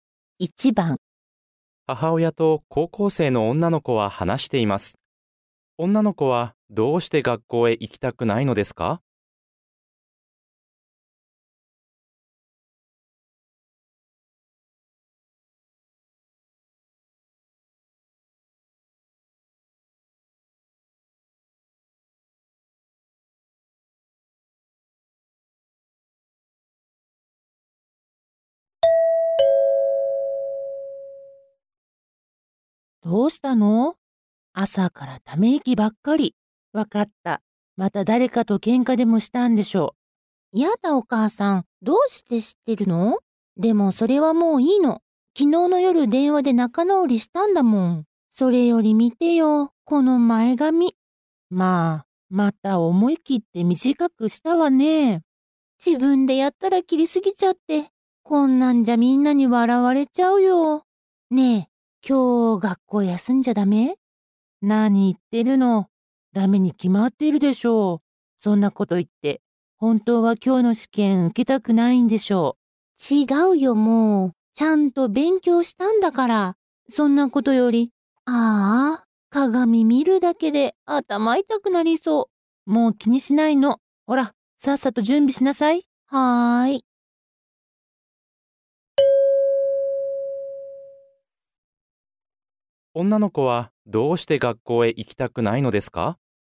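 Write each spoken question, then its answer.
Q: 女の子はどうして学校へ行きたくないのですか?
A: 自分で前髪を短く切りすぎて、みんなに笑われると思ったから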